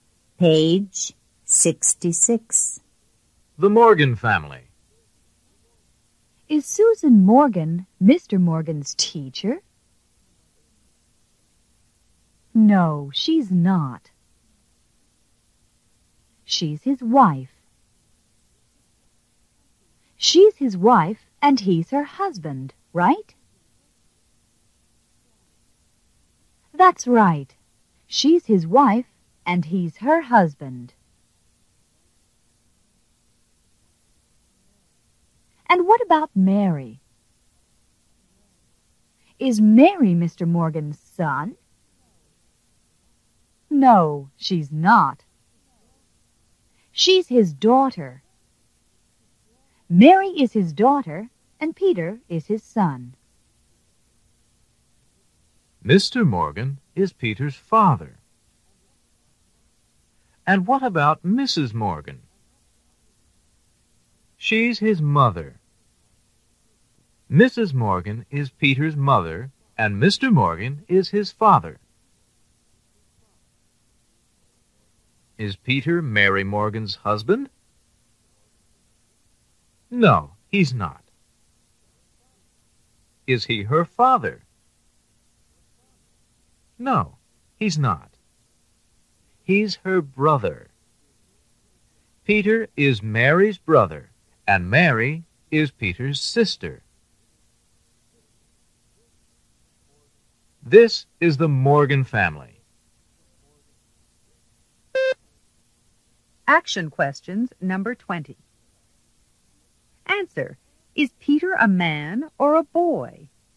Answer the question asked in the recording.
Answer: He's a boy.